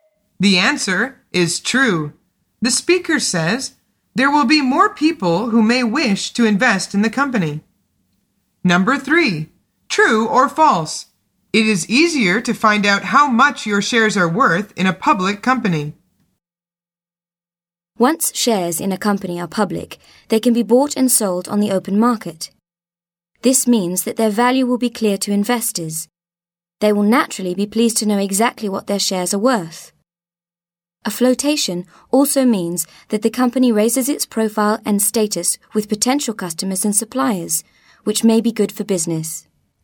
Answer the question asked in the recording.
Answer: The answer is true.